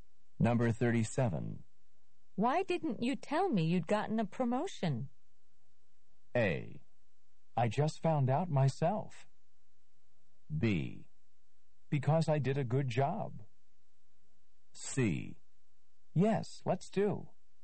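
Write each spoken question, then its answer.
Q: Why didn't you tell me you'd gotten a promotion?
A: A: I just found out myself.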